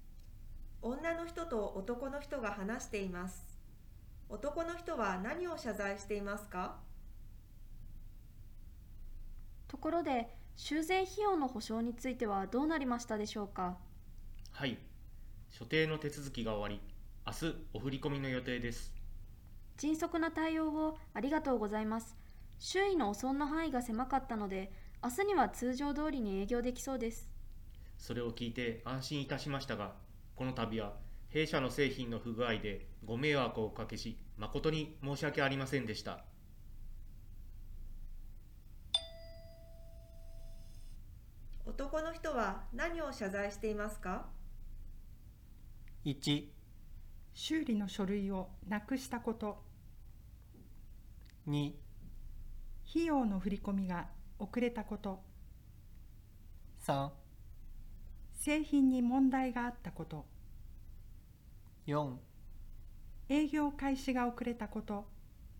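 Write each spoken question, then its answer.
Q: 男の人は何を謝罪していますか?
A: 3: 製品に問題があったこと。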